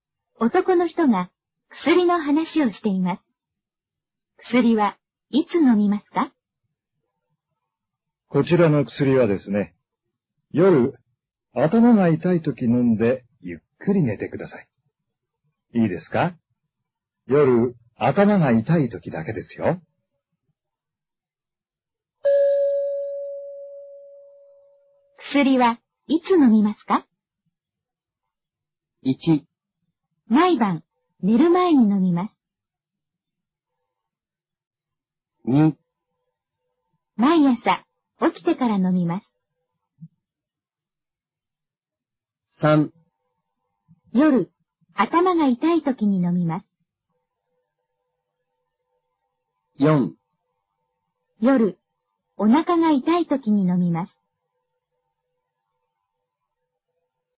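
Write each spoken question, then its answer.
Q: 薬はいつ飲みますか?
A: 3: 夜、頭が痛い時に飲みます。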